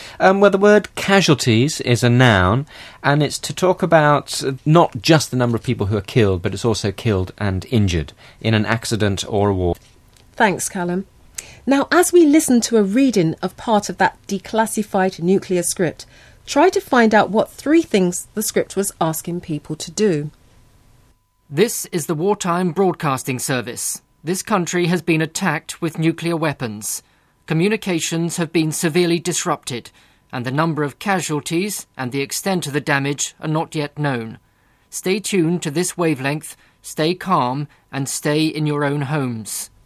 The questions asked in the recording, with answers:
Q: try to find out what three things the script was asking people to do.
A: it told people to stay tuned